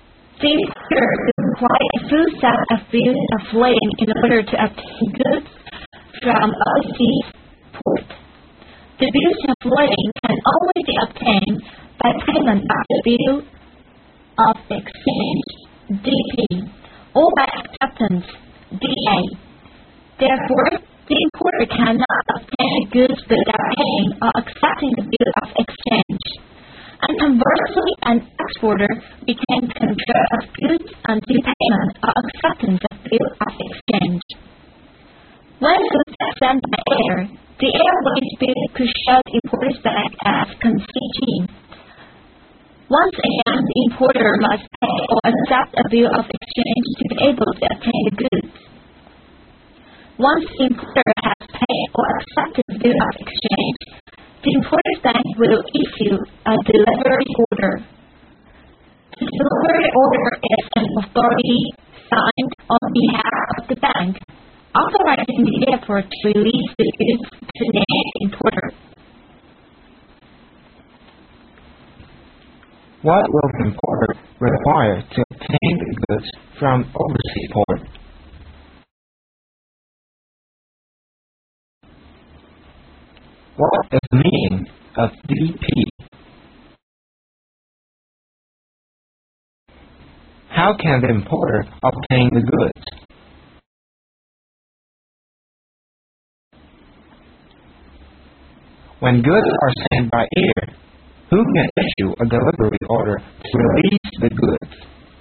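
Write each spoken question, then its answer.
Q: How can the importer obtain the goods?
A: By paying or accepting the bill of exchange

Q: When goods are sent by air, who can issue a delivery order to release the goods?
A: The importer's bank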